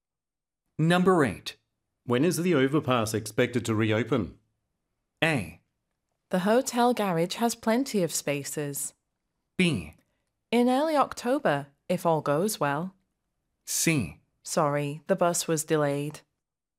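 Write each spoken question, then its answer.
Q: When is the overpass expected to reopen?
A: B: In early October. If all goes well.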